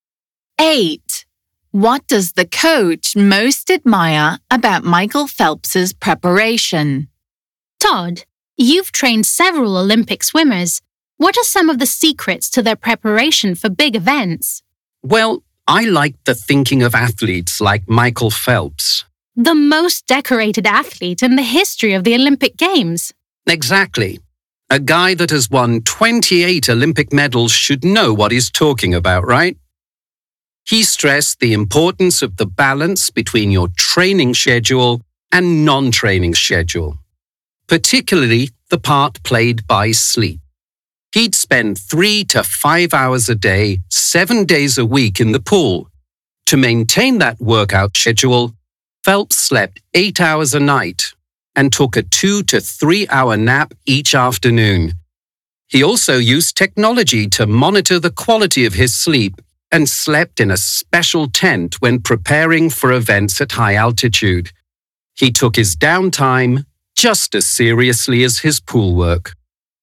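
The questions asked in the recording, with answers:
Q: What does the coach most admire about Michael Phelps' preparation?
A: His balance between training and rest, especially sleep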